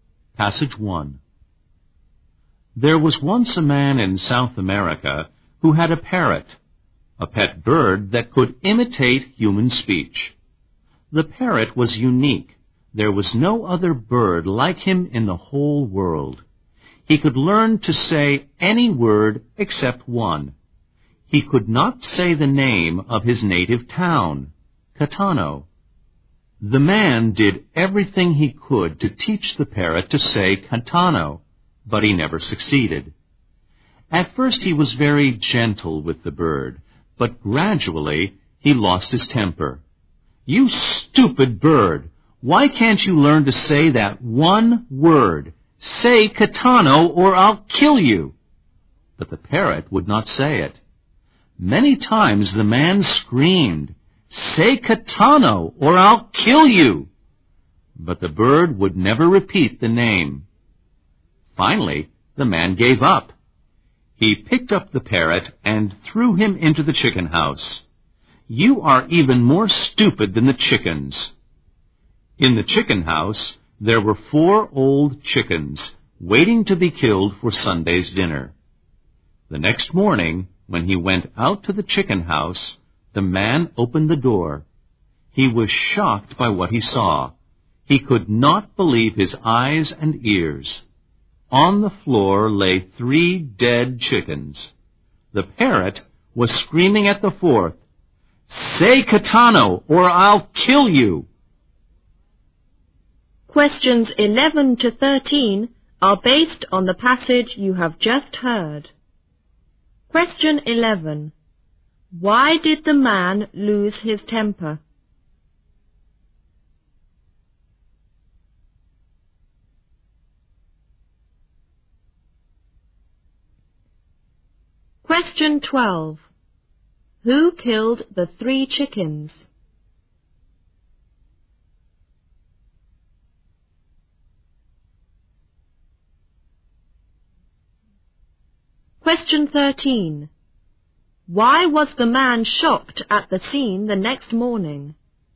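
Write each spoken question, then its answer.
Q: Why did the man lose his temper?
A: The parrot would not learn to say the name of his native town, Catano.

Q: Who killed the three chickens?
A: The parrot

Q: Why was the man shocked at the scene the next morning?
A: Three chickens were dead and the parrot was screaming at the fourth, "Say Catano or I'll kill you!"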